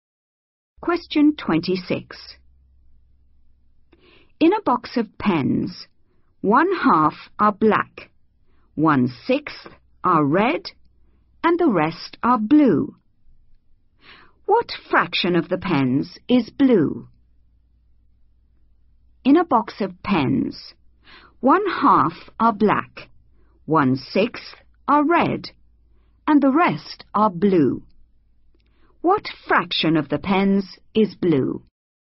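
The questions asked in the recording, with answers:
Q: What fraction of the pens is blue?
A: 1/3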